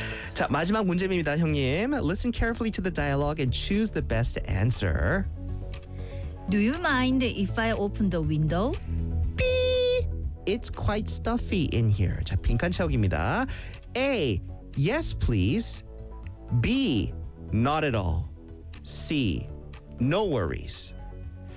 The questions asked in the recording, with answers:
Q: Do you mind if I open the window? It's quite stuffy in here.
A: B라고 했죠? B. 네. Not at all.